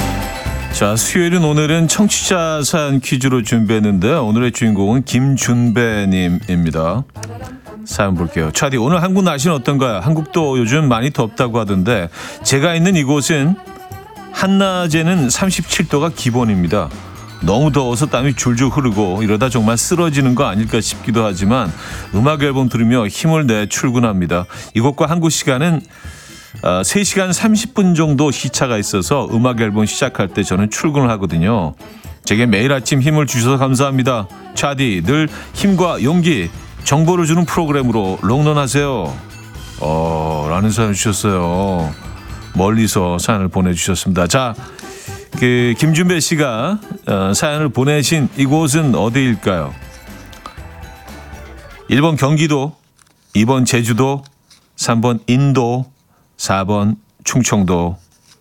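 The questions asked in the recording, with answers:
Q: 자, 그 김준배 씨가 사연을 보내신 이곳은 어디일까요?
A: 3번: 인도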